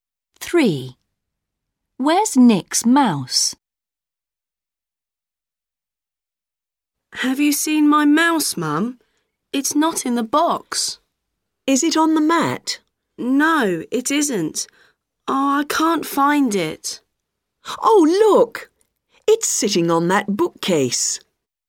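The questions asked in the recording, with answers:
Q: Where's Nick's mouse?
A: on the bookcase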